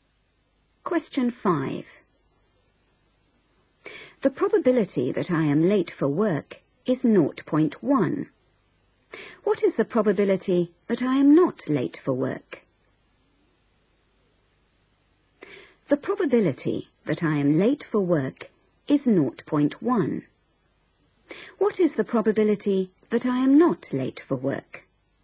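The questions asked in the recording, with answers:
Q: What is the probability that I am not late for work?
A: 0.9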